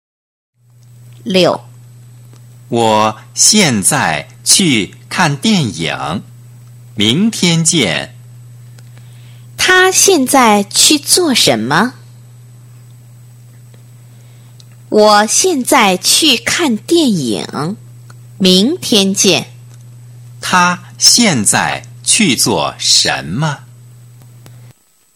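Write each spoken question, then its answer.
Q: 他现在去做什么?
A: 看电影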